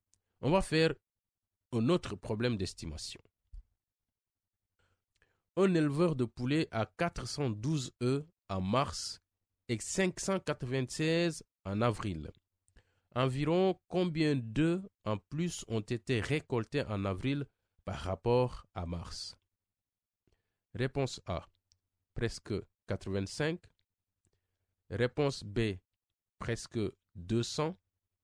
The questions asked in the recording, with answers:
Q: Environ combien d'œufs en plus ont été récoltés en avril par rapport à mars?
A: J'ai répondu B, presque 200.